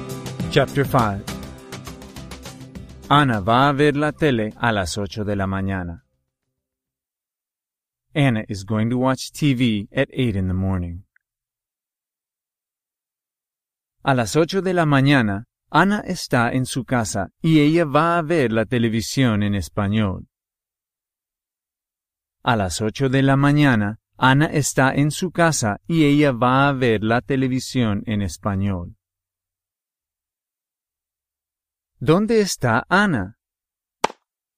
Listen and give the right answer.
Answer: Anna está en su casa.